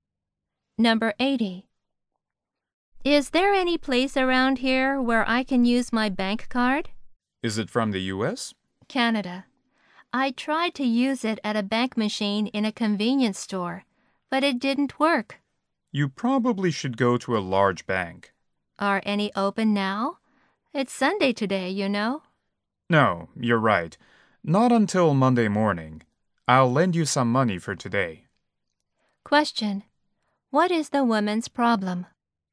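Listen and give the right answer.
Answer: She can't use her Canadian bank card and banks are closed on Sunday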